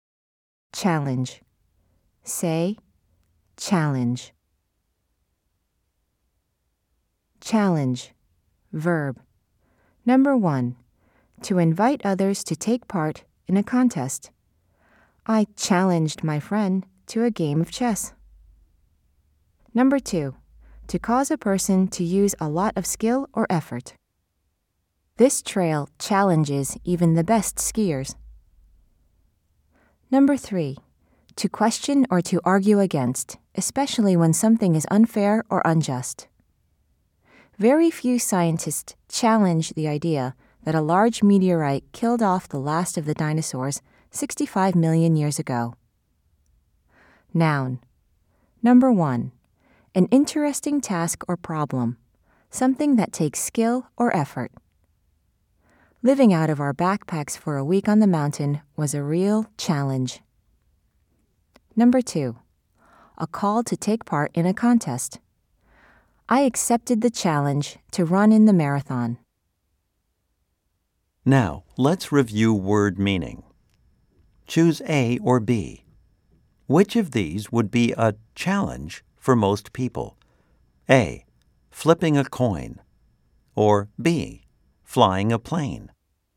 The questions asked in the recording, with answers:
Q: Choose A or B. Which of these would be a challenge for most people?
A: If you said B, you are correct.